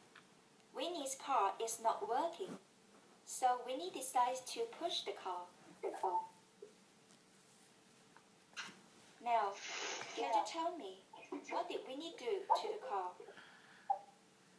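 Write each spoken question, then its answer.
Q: Now, can you tell me what did Winnie do to the car?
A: He pushed the car.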